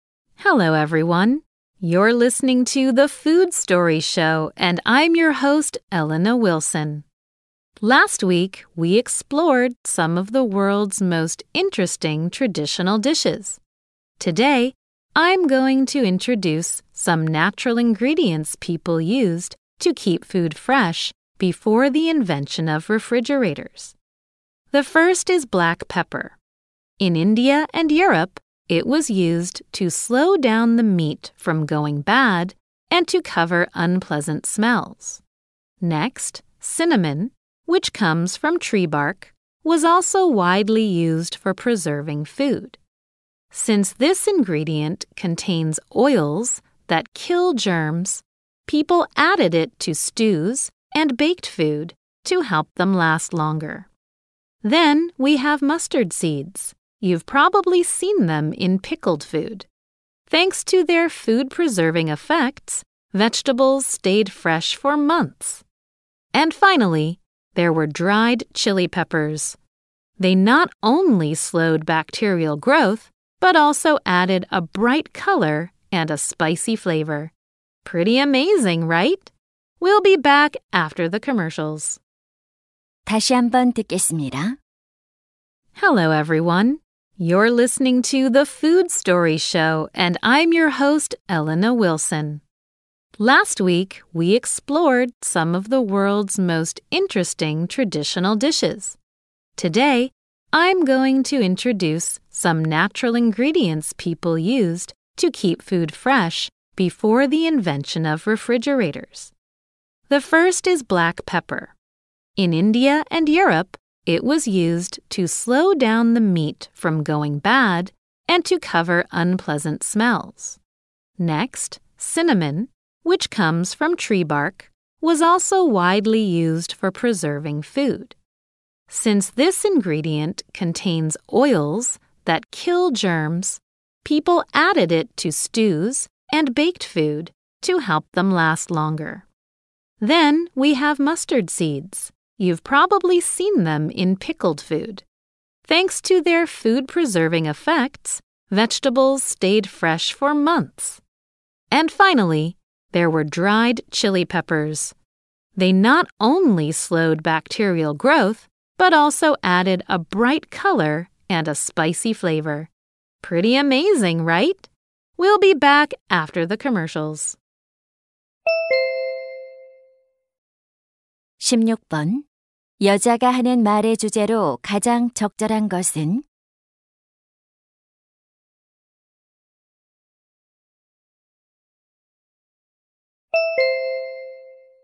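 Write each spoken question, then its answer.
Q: 여자가 하는 말의 주제로 가장 적절한 것은?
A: 냉장고 발명 이전에 음식 보존에 사용된 천연 재료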